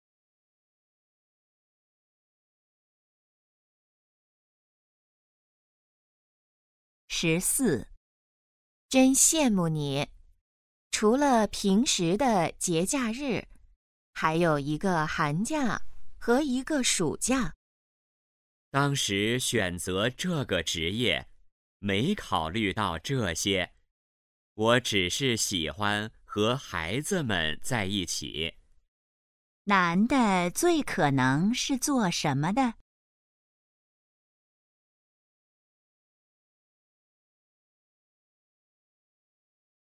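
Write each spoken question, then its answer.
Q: 男的最可能是做什么的?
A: 老师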